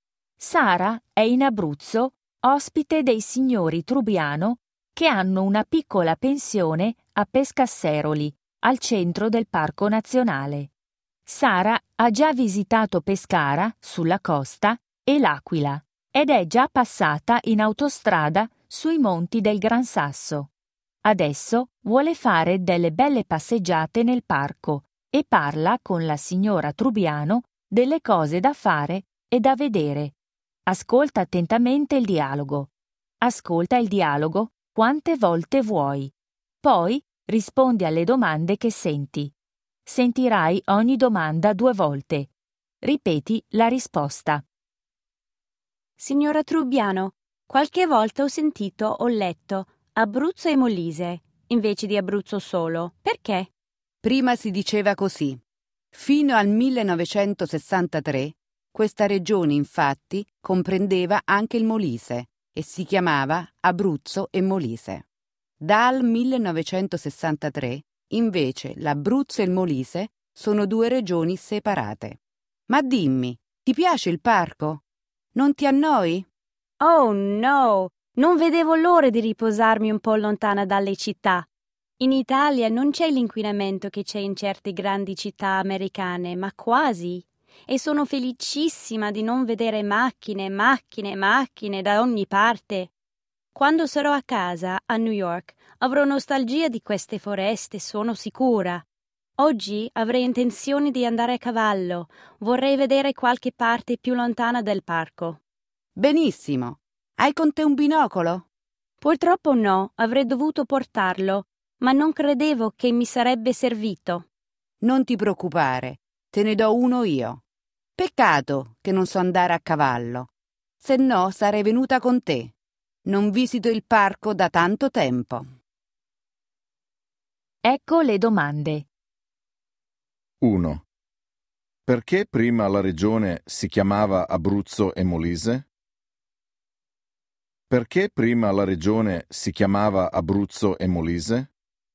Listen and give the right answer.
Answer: Perché era una sola regione che comprendeva anche il Molise.